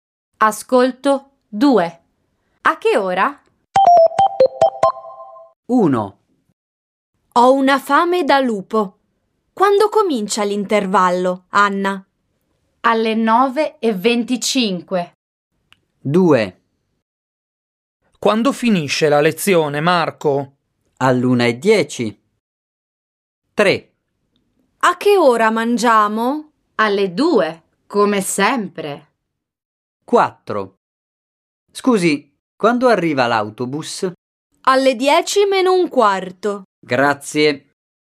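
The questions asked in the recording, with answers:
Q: Quando comincia l'intervallo, Anna?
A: Alle 9:25

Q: Quando finisce la lezione, Marco?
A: All'1:10

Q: A che ora mangiamo?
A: Alle 2

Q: Scusi, quando arriva l'autobus?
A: Alle 10 meno un quarto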